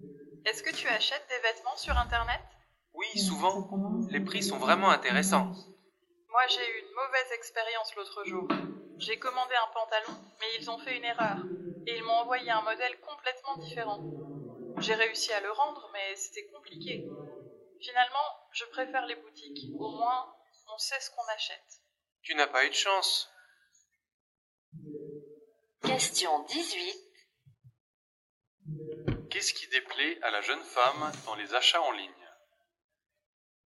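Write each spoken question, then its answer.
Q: Qu'est-ce qui déplaît à la jeune femme dans les achats en ligne?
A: On ne sait pas vraiment ce qu'on achète (risque d'erreur, retour compliqué)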